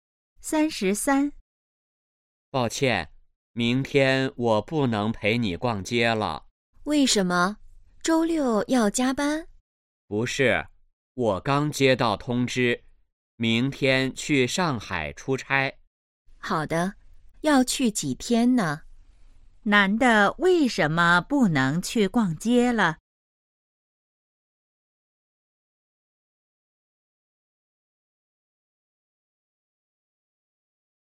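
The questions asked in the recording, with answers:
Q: 男的为什么不能去逛街了?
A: 要去上海出差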